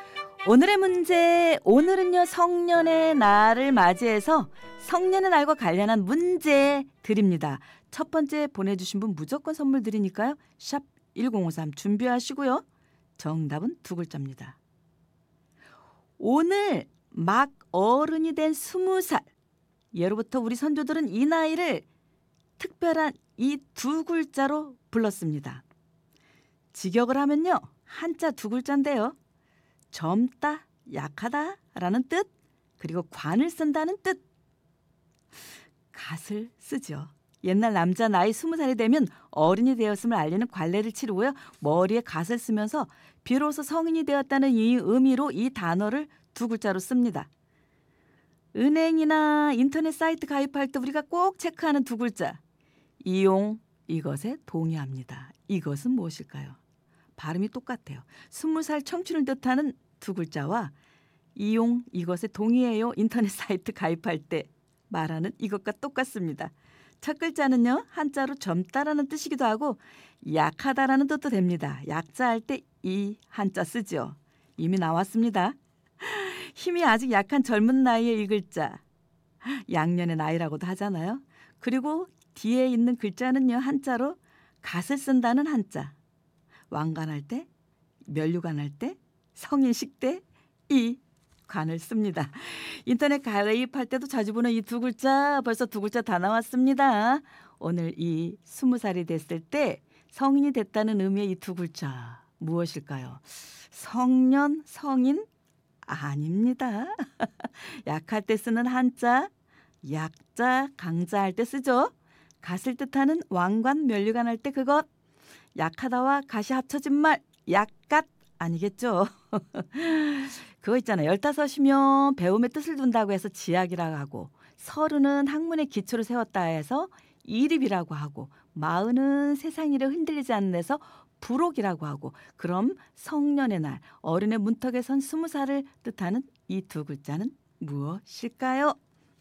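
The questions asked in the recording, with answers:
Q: 그럼 성년의 날, 어른의 문턱에 선 스무 살을 뜻하는 이 두 글자는 무엇일까요?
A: 약관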